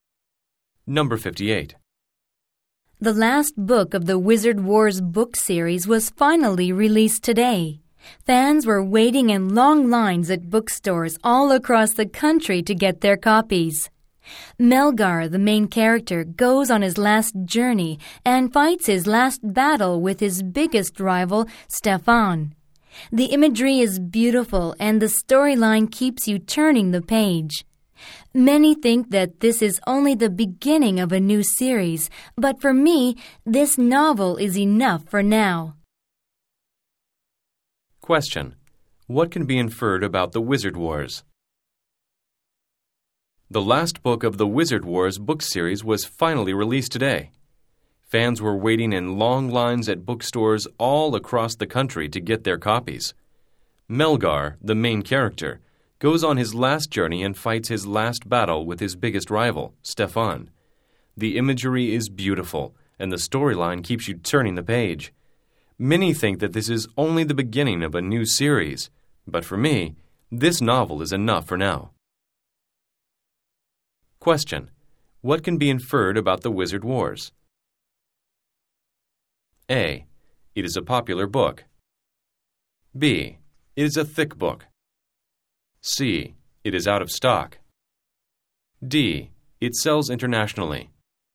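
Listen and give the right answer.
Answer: A: It is a popular book.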